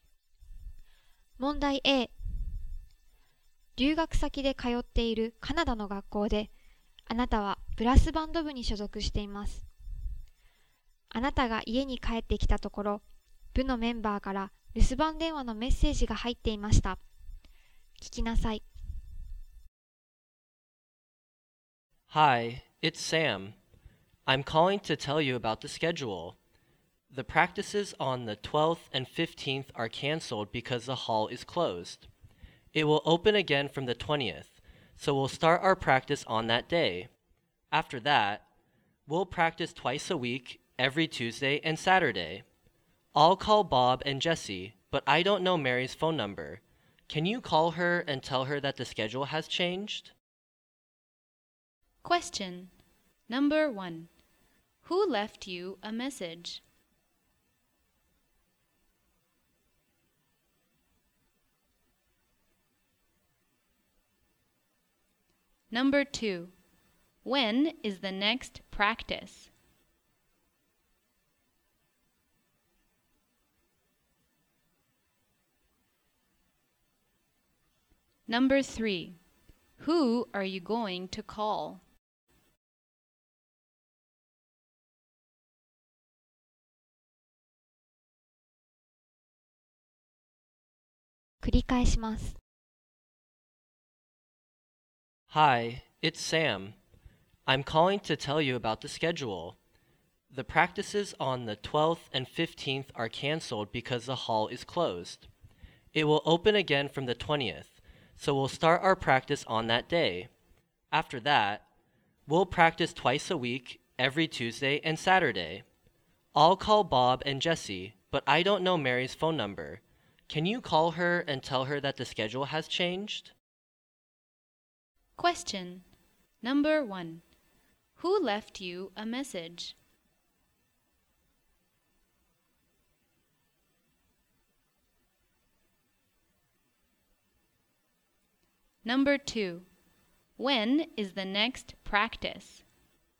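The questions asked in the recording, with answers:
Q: Who left you a message?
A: Sam

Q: When is the next practice?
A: On the 20th

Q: Who are you going to call?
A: Mary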